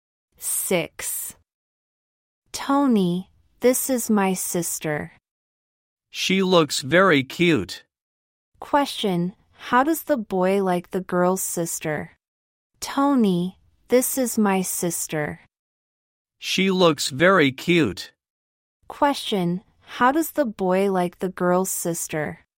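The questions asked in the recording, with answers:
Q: Question, how does the boy like the girl's sister?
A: He thinks she looks very cute.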